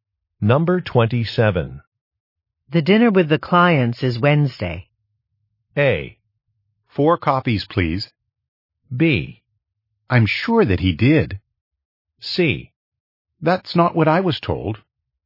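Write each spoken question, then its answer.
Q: The dinner with the clients is Wednesday.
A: C: That's not what I was told.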